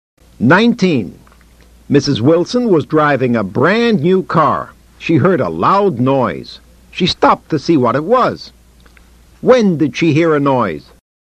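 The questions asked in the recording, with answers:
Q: When did she hear a noise?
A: While she was driving her new car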